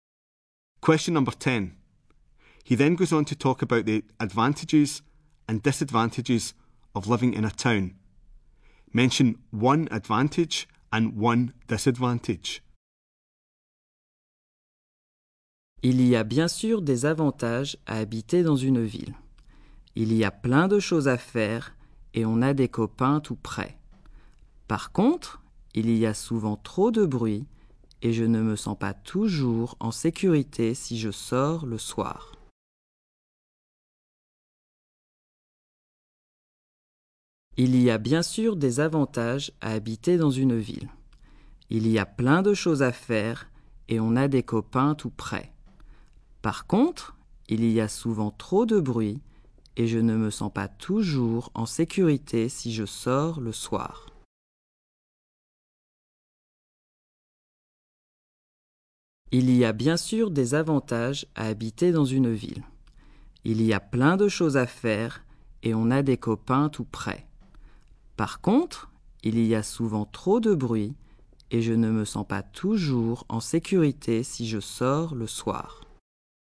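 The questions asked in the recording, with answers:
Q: Mention one advantage and one disadvantage.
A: Advantage: lots to do / friends nearby; disadvantage: too much noise / not safe going out at night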